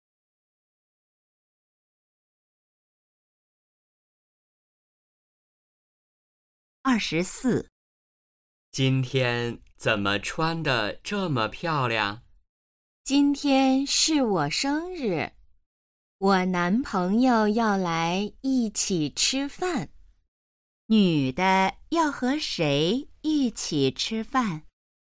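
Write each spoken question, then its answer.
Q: 女的要和谁一起吃饭?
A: 男朋友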